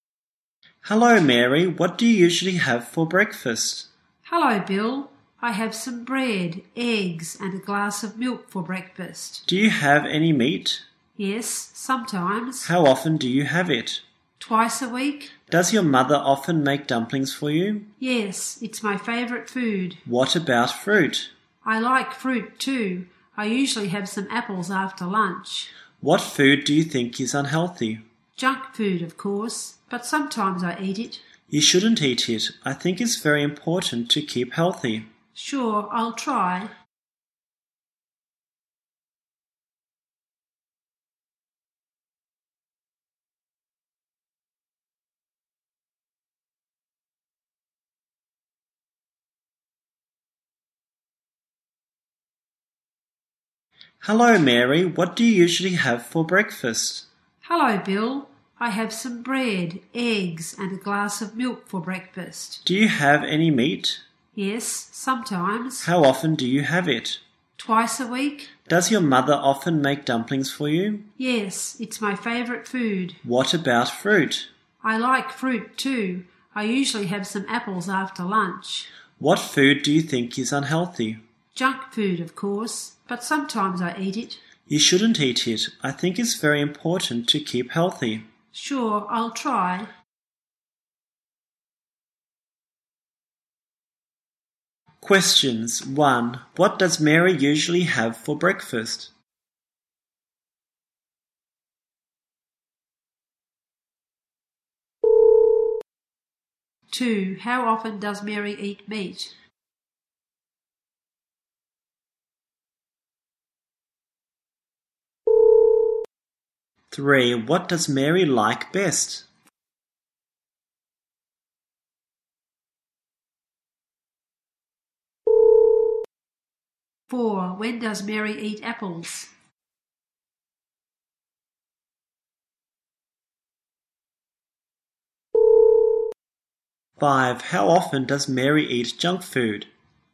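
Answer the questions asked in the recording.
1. Bread, eggs and a glass of milk
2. Twice a week
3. Dumplings
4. After lunch
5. Sometimes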